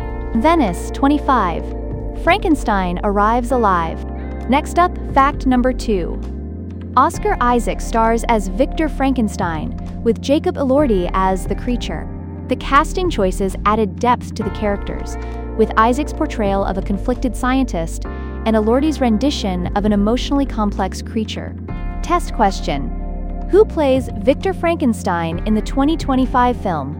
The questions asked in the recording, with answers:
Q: who plays Victor Frankenstein in the 2025 film?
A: Oscar Isaac.